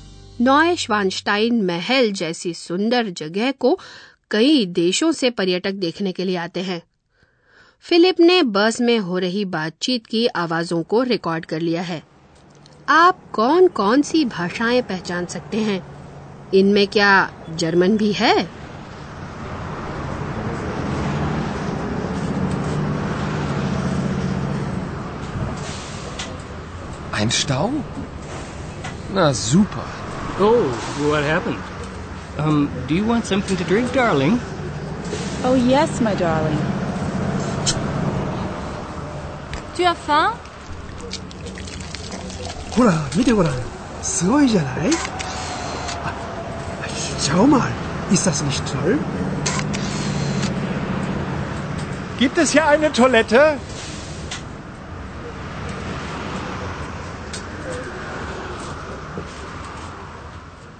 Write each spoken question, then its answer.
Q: आप कौन कौन सी भाषाएं पहचान सकते हैं इनमें क्या German भी है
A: शायद आपको अंग्रेजी या French भी सुनाई दी होगी या फिर जापानी और German